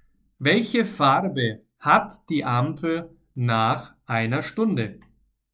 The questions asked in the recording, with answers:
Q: Welche Farbe hat die Ampel nach einer Stunde?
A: Rot.